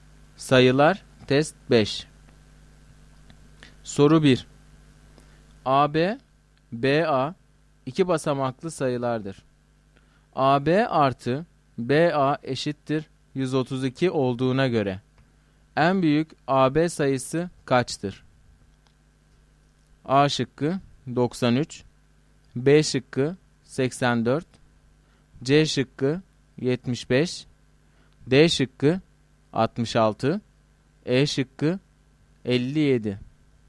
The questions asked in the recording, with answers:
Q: AB artı BA eşittir 132 olduğuna göre en büyük AB sayısı kaçtır?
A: Doğru cevap A şıkkı.